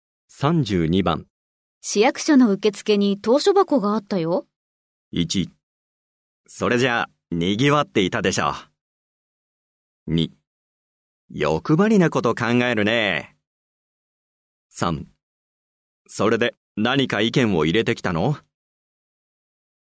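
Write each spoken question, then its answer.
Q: 市役所の受付に投書箱があったよ。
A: 3: それで何か意見を入れてきたの?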